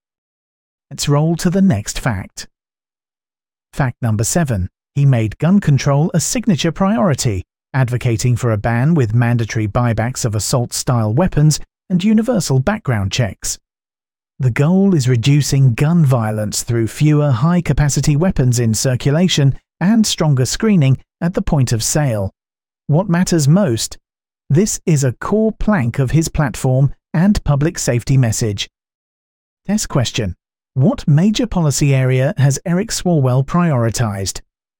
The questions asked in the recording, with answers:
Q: What major policy area has Eric Swalwell prioritized?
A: Gun control.